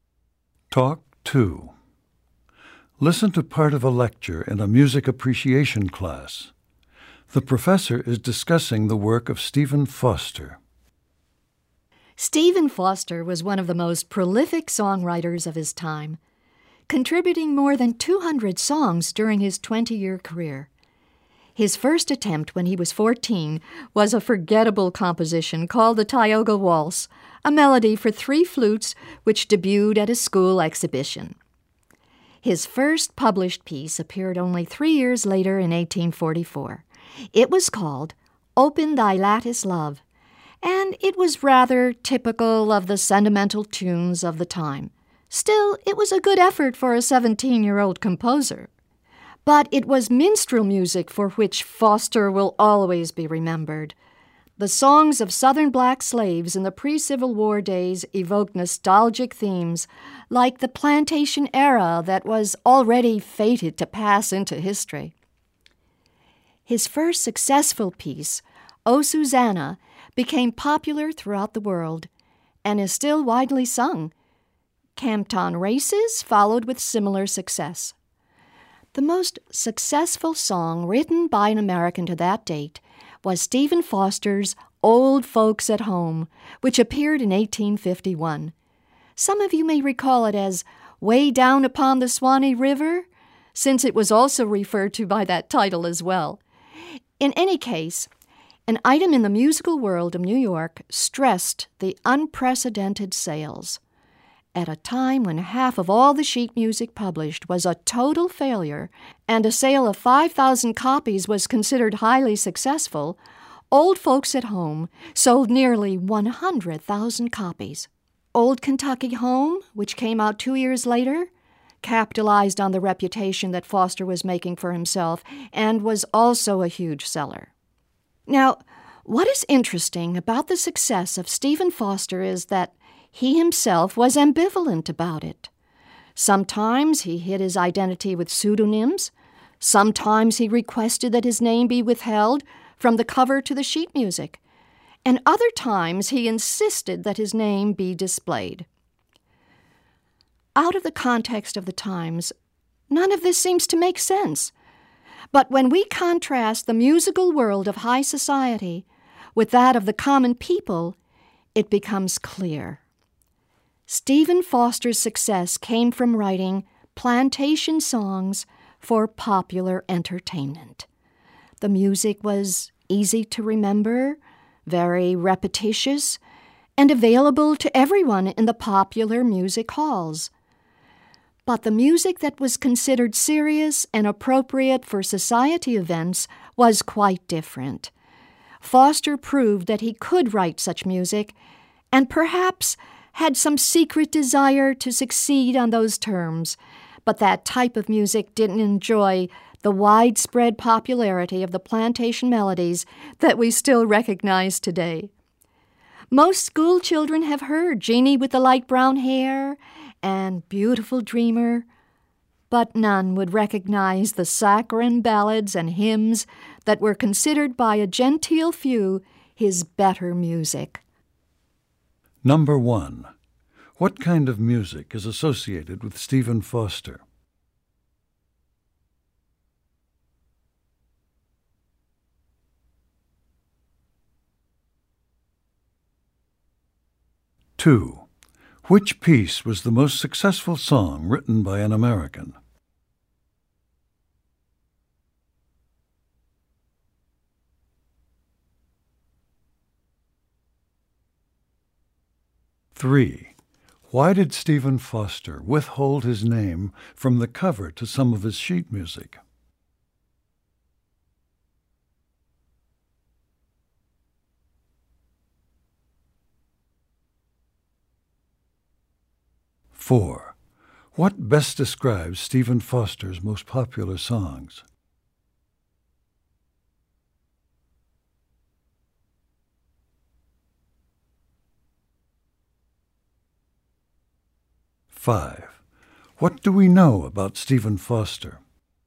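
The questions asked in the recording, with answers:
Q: What kind of music is associated with Stephen Foster?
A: Minstrel (plantation) songs

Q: What best describes Stephen Foster's most popular songs?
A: Easy to remember and repetitious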